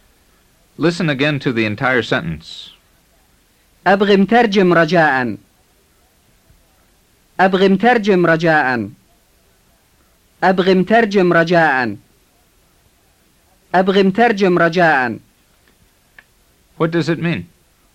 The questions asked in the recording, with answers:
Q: What does it mean?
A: It means, I want an interpreter, please.